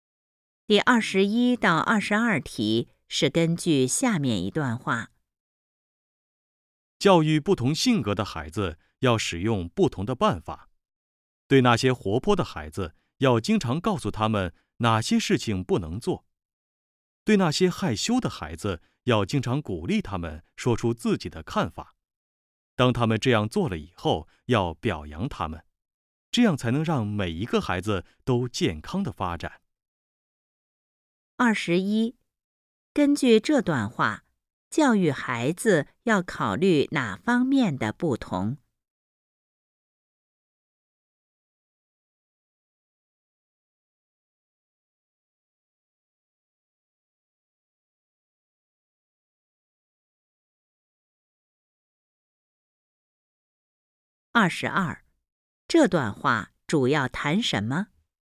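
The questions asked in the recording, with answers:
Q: 二十一,根据这段话,教育孩子要考虑哪方面的不同?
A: 性格

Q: 二十二,这段话主要谈什么?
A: 怎样教育不同性格的孩子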